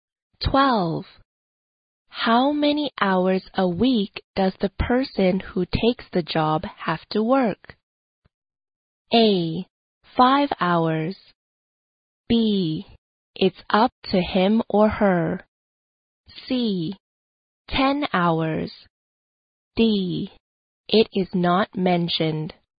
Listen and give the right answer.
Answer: 答案应该选 C, 10 hours。